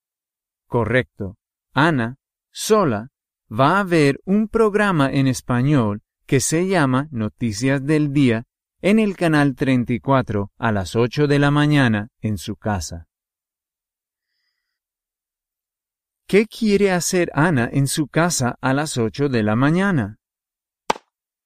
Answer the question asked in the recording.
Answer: Ana quiere ver la televisión a las 8 de la mañana.